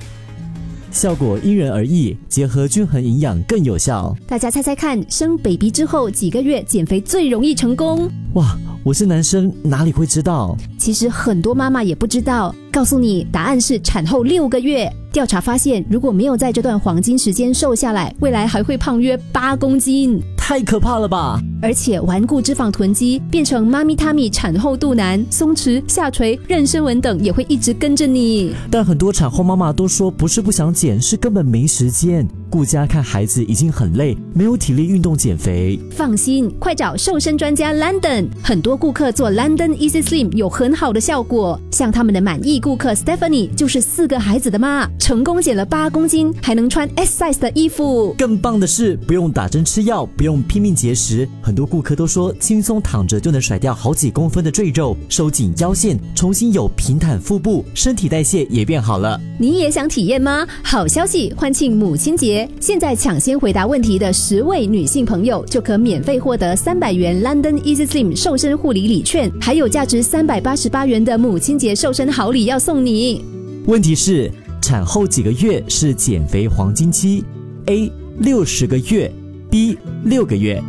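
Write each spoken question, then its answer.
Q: 问题是,产后几个月是减肥黄金期 ?A 60个月 ,B 6个月。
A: B: 6个月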